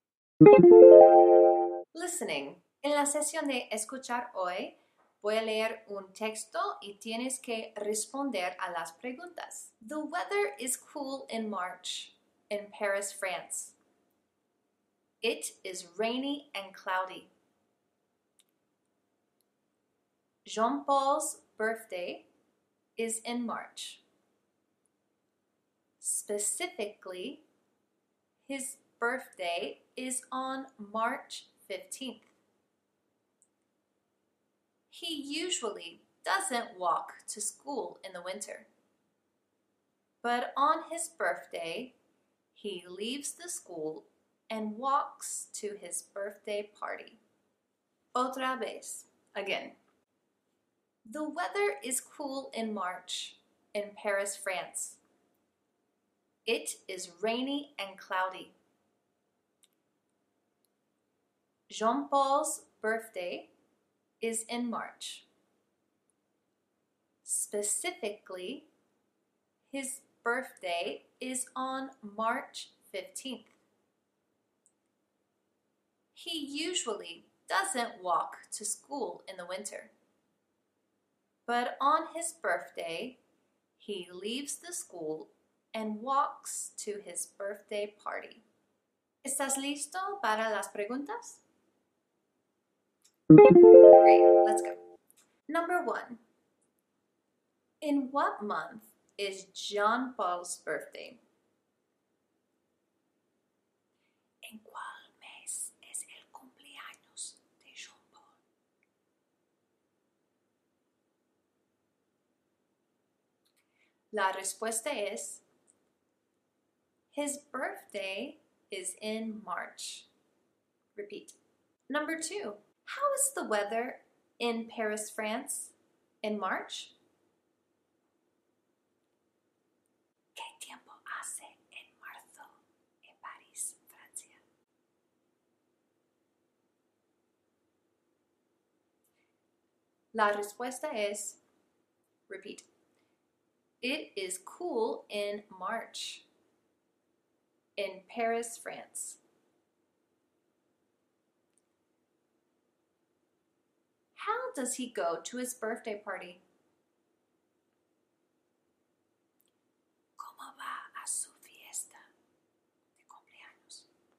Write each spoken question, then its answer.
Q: In what month is Jean Paul's birthday?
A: His birthday is in March.

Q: How is the weather in Paris, France in March?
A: it is cool in March in Paris, France.

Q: does he go to his birthday party?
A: he walks to his birthday party.